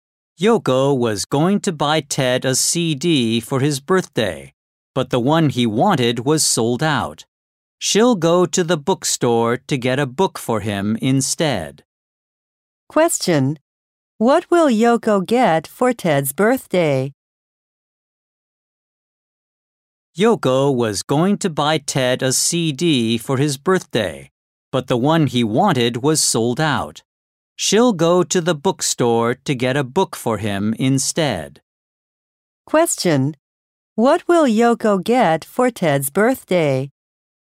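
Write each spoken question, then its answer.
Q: What will Yoko get for Ted's birthday?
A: A book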